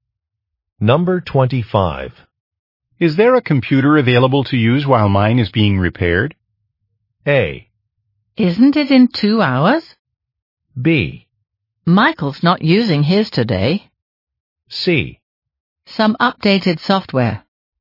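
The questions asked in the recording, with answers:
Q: Is there a computer available to use while mine is being repaired?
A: B: Michael's not using his today.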